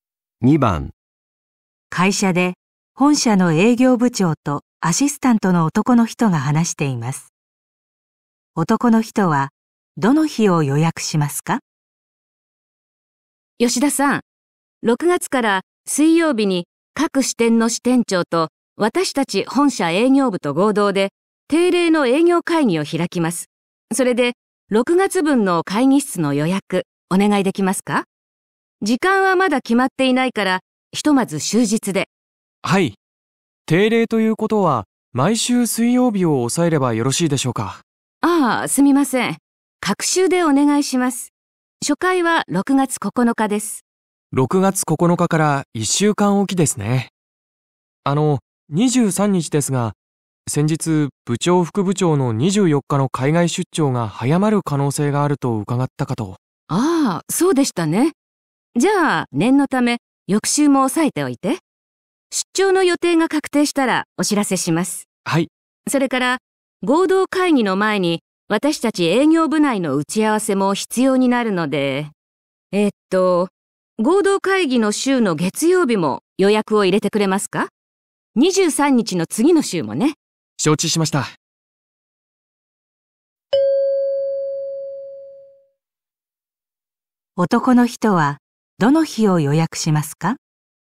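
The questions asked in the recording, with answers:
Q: 男の人はどの日を予約しますか?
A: 6月7日、9日、21日、23日、28日、30日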